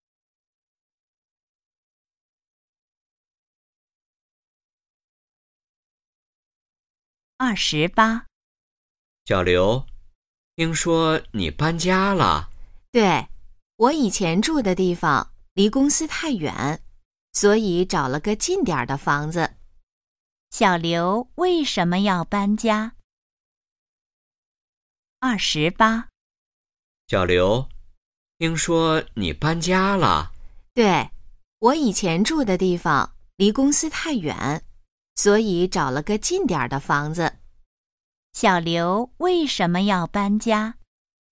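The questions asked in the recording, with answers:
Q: 小刘为什么要搬家?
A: 以前住的地方离公司太远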